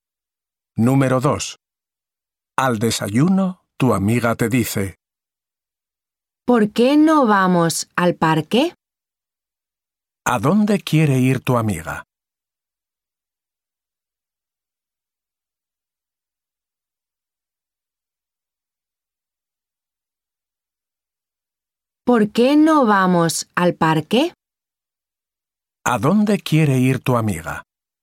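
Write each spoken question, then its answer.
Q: ¿A dónde quiere ir tu amiga?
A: Al parque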